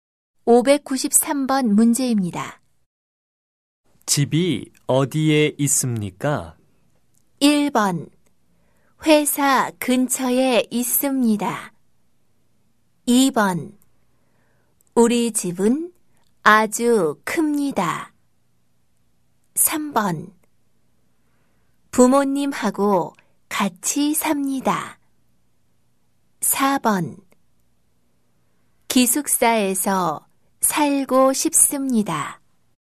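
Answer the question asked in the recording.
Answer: 1: 회사 근처에 있습니다.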